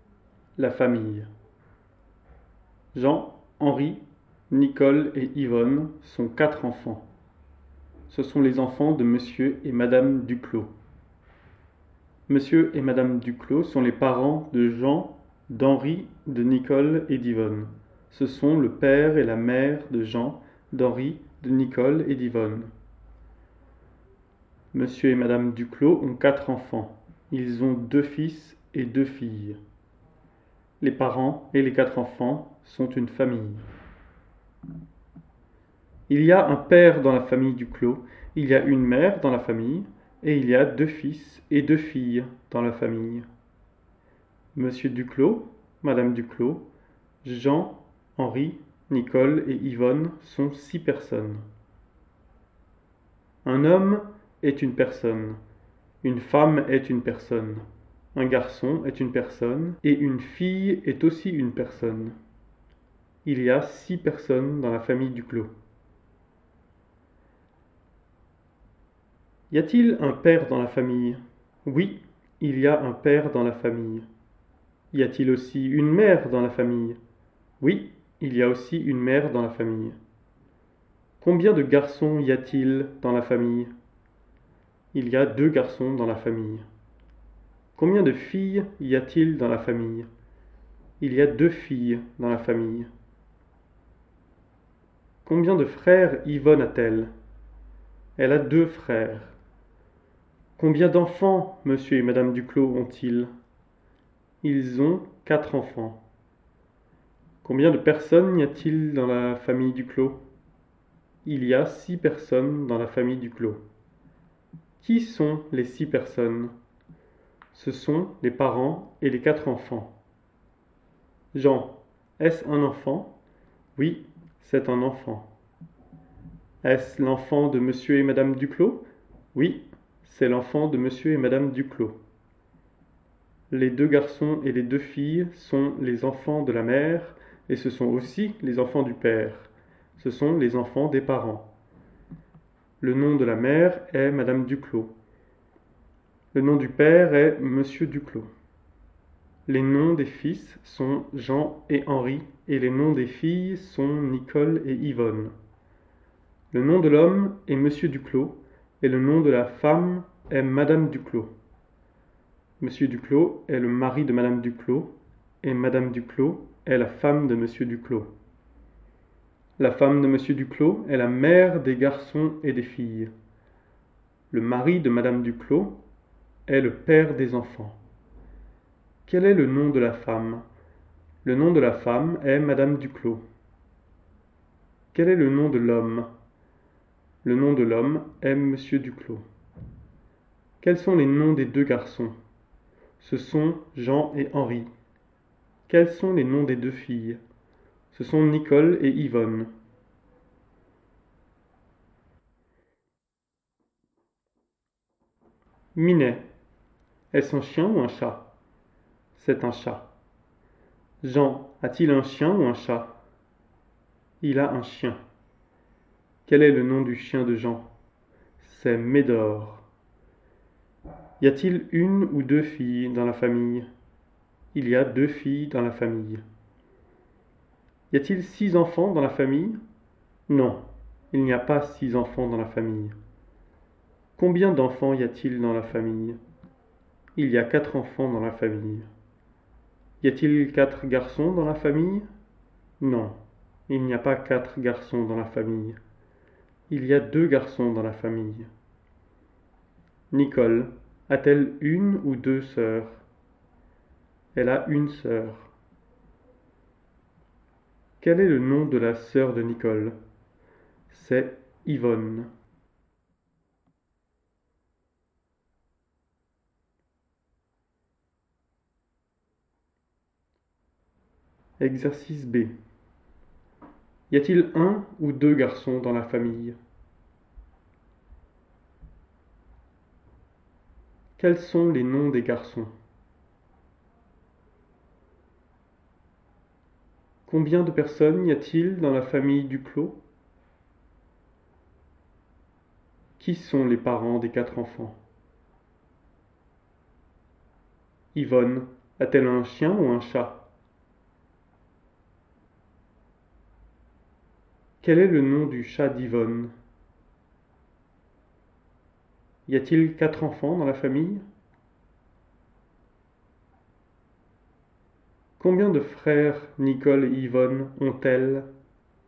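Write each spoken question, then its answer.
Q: Y a-t-il un ou deux garçons dans la famille?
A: Il y a deux garçons.

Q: Quels sont les noms des garçons?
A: Jean et Henri

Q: Combien de personnes y a-t-il dans la famille Duclos?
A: Six personnes

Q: Qui sont les parents des quatre enfants?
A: Monsieur et Madame Duclos

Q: Y a-t-il quatre enfants dans la famille?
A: Oui, il y a quatre enfants.

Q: Combien de frères Nicole et Yvonne ont-elles?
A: Deux frères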